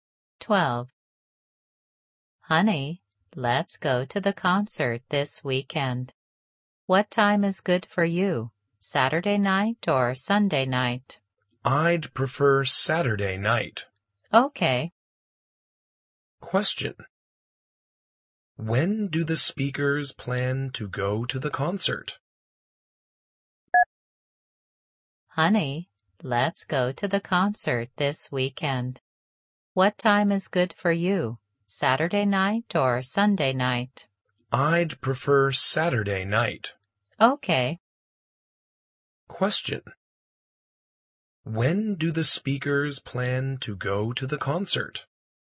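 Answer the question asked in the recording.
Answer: On Saturday night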